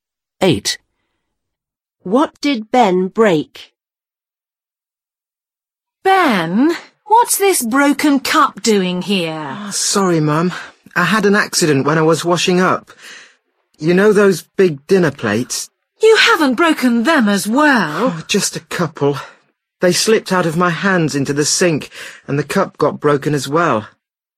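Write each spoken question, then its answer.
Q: What did Ben break?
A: A cup and a couple of big dinner plates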